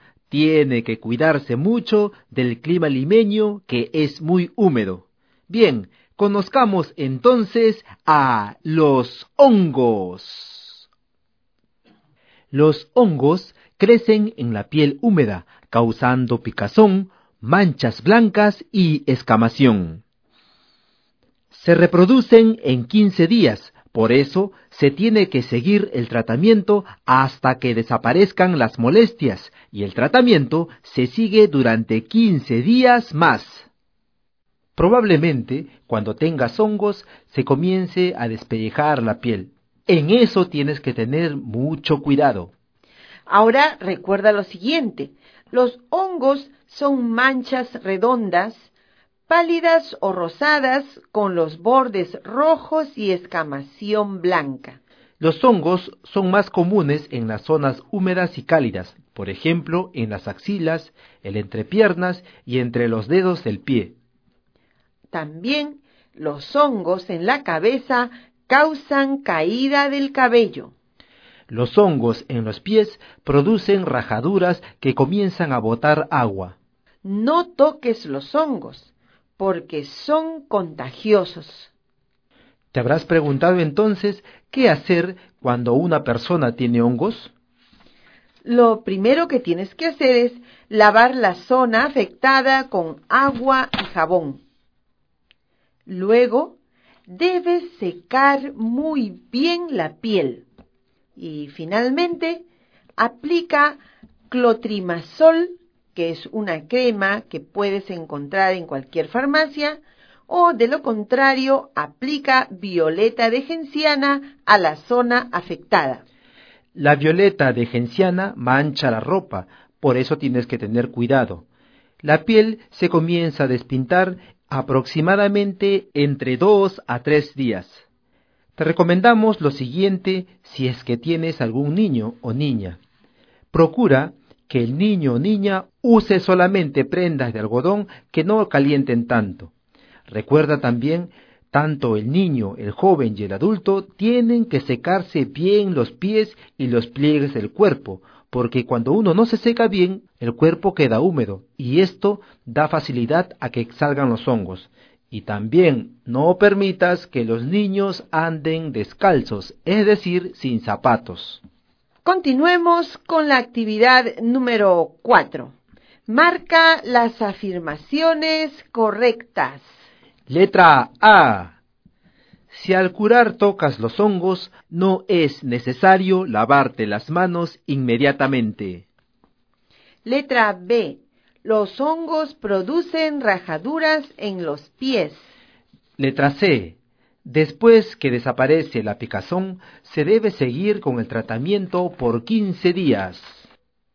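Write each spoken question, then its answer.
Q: Letra A. Si al curar tocas los hongos, no es necesario lavarte las manos inmediatamente.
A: Incorrecta

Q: Letra B. Los hongos producen rajaduras en los pies.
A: Correcta

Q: Letra C. Después que desaparece la picazón, se debe seguir con el tratamiento por 15 días.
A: Correcta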